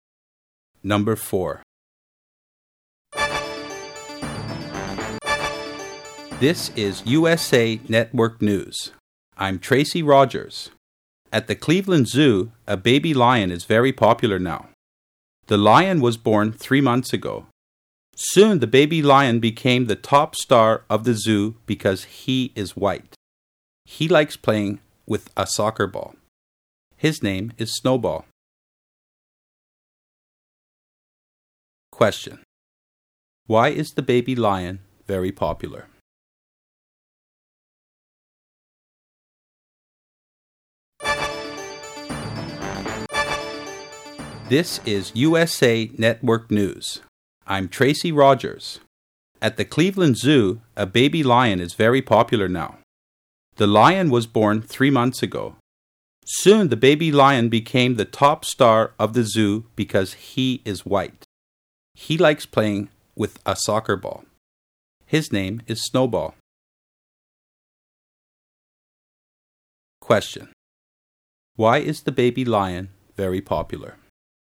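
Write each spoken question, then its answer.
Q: Question. Why is the baby lion very popular?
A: Because he is white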